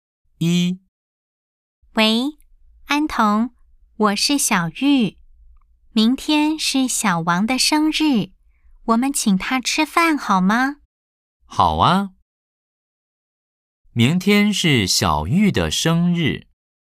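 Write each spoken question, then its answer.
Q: 明天是小玉的生日。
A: 错 (X):明天是小王的生日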